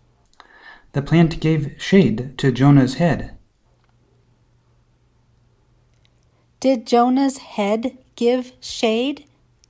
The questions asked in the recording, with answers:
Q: Did Jonah's head give shade?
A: No, the plant gave shade.